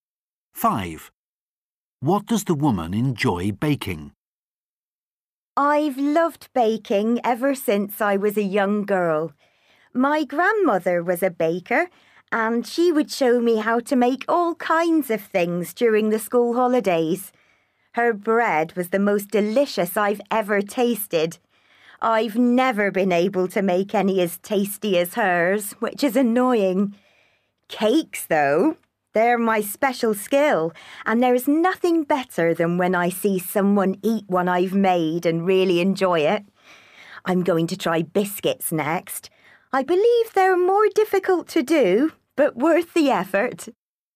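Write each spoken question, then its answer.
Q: What does the woman enjoy baking?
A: Cakes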